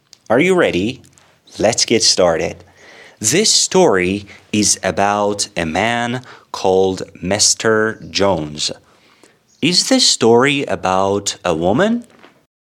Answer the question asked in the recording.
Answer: Of course not. This story is about a man.